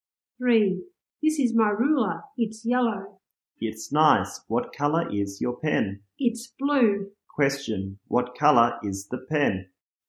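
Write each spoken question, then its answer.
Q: What color is the pen?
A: Blue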